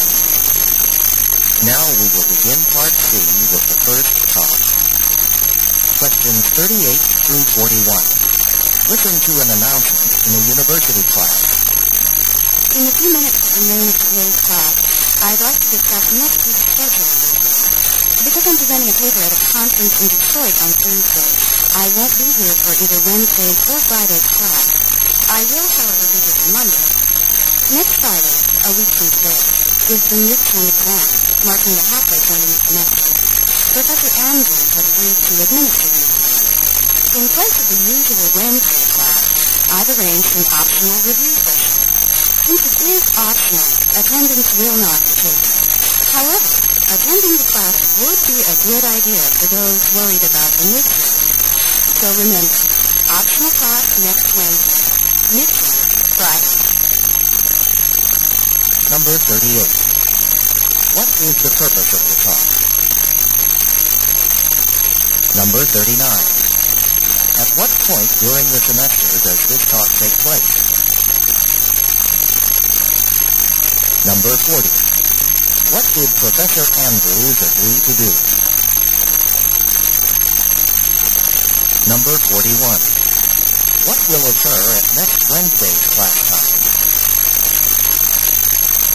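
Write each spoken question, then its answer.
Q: What is the purpose of the talk?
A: To discuss next week's schedule

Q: What did Professor Andrews agree to do?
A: Give the midterm exam

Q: What will occur at next Wednesday's class time?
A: An optional review session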